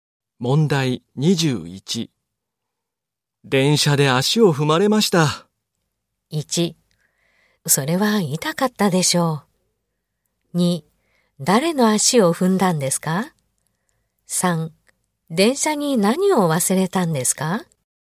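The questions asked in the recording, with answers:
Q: 電車で足を踏まれました。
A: 3: それは痛かったでしょう。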